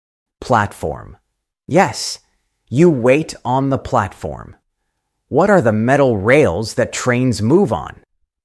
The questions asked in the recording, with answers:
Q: What are the metal rails that trains move on?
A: Tracks. Good job. Trains move on tracks.